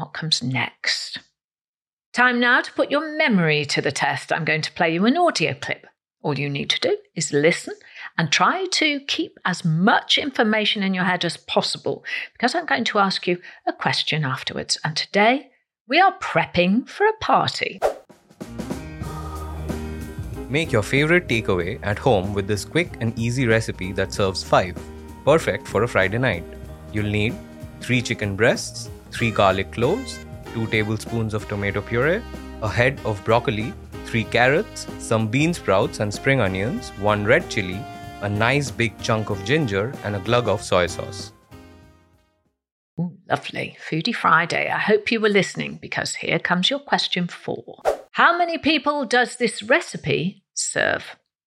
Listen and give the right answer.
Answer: And the answer was, it serves 5 people.